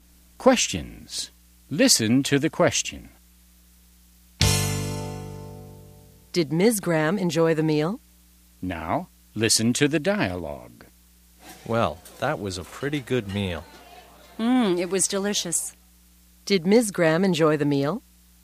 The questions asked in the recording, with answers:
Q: Did Ms. Graham enjoy the meal?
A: Yes, she did. She thought it was delicious.